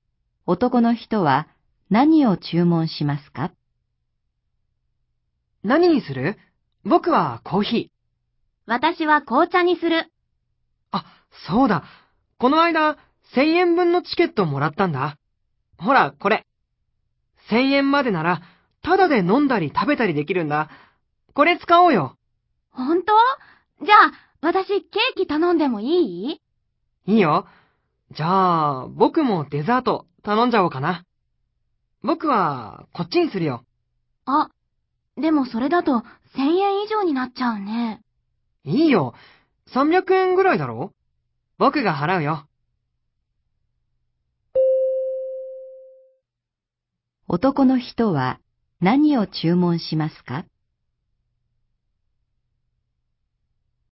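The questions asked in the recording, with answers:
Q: 男の人は何を注文しますか?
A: コーヒーとデザート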